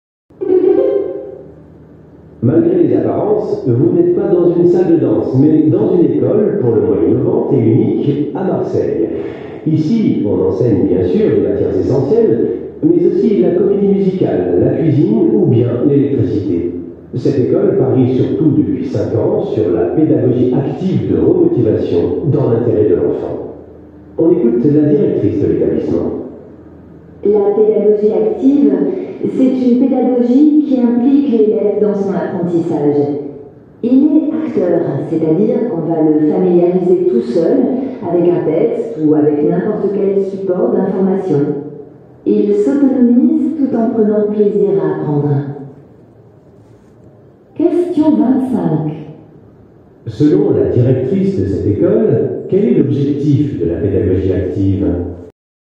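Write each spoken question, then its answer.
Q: Selon la directrice de cette école, quel est l'objectif de la pédagogie active ?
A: Impliquer l'élève pour qu'il devienne autonome en prenant plaisir à apprendre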